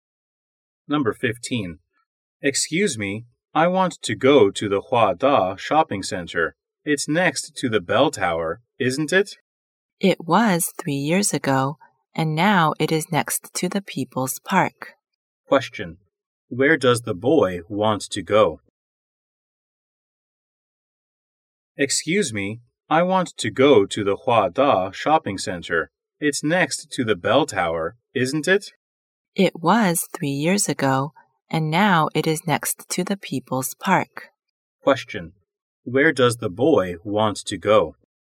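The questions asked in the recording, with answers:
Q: where does the boy want to go?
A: The Hua Da shopping center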